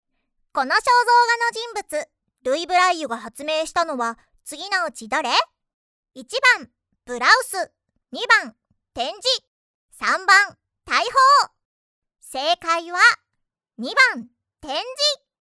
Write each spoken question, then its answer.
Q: この肖像画の人物、ルイ・ブライユが発明したのは次のうち誰?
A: 正解は、2番、展示。